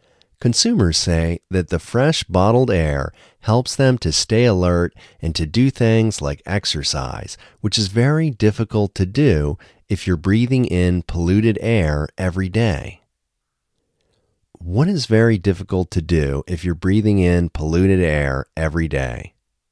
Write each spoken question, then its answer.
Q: What is very difficult to do if you're breathing in polluted air every day?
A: It is very difficult to exercise if you're breathing in polluted air every day.